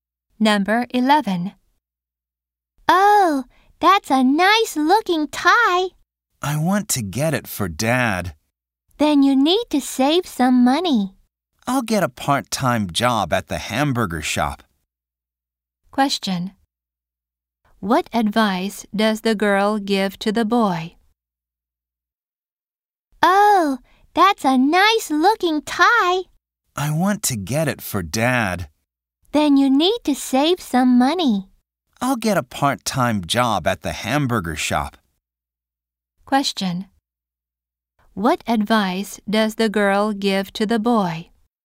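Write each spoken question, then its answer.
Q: What advice does the girl give to the boy?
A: To save some money.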